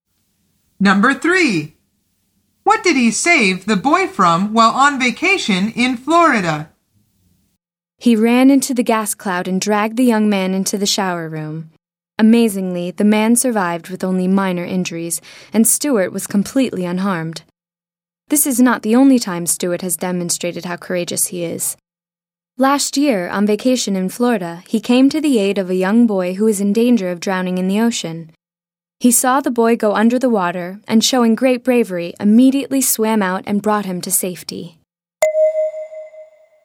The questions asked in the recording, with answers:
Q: What did he save the boy from while on vacation in Florida?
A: The answer is drowning.